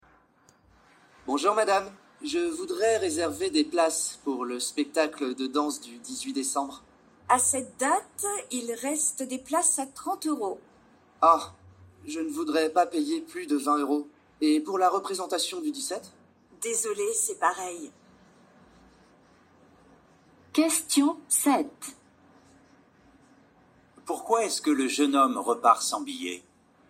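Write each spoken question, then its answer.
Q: Pourquoi est-ce que le jeune homme repart sans billets?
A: Les places sont trop chères (30 euros, il ne veut pas payer plus de 20 euros).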